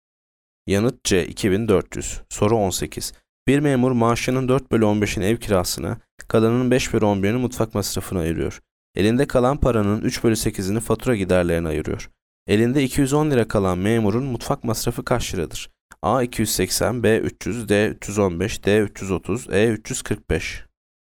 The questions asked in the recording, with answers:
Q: Elinde 210 lira kalan memurun mutfak masrafı kaç liradır?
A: Yanıt A 280.